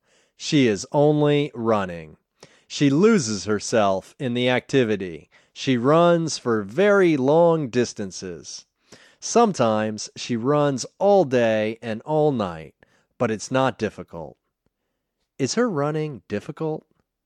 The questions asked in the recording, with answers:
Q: Is her running difficult?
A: No, it's not difficult.